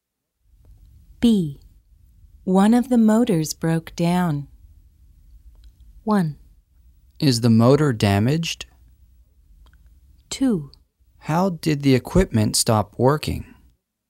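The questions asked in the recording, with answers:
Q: One of the motors broke down.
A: 2: How did the equipment stop working?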